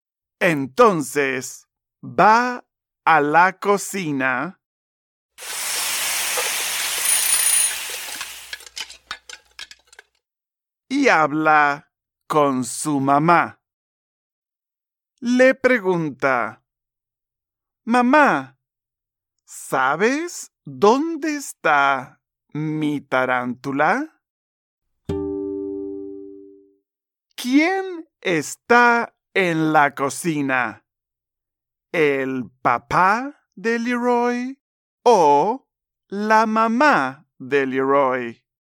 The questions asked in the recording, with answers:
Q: ¿Quién está en la cocina?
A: Muy bien. Su mamá está en la cocina.